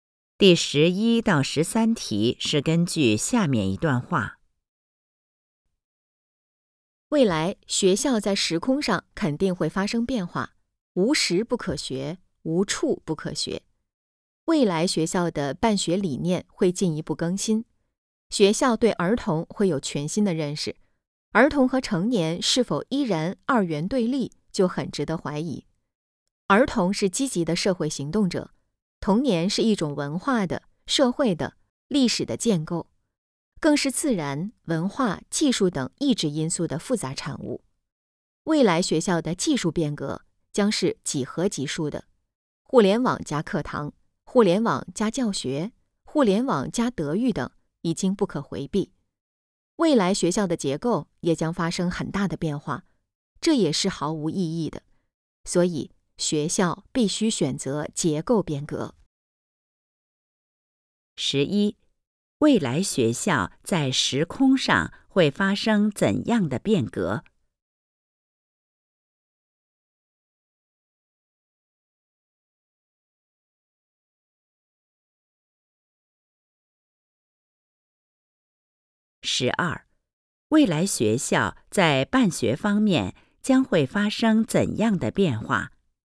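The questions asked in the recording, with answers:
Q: 十一,未来学校在时空上会发生怎样的变革?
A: 无时不可学,无处不可学

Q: 十二,未来学校在办学方面将会发生怎样的变化?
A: 办学理念会进一步更新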